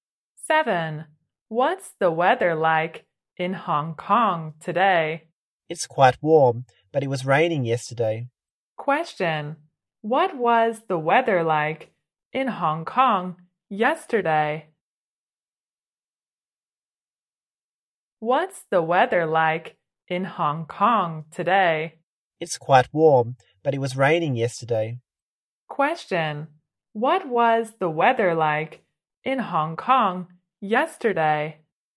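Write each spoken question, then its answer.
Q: Question, what was the weather like in Hong Kong yesterday?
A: Rainy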